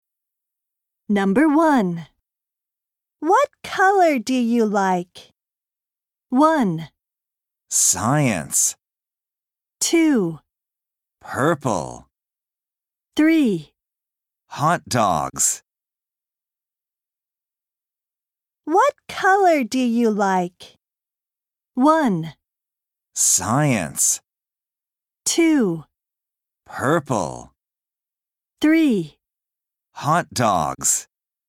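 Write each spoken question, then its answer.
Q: What color do you like?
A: 2: Purple.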